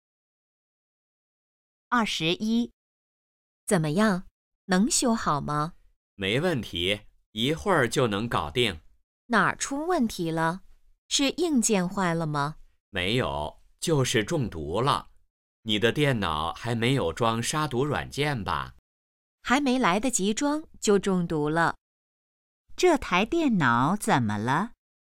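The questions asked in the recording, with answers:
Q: 这台电脑怎么了?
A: 中毒了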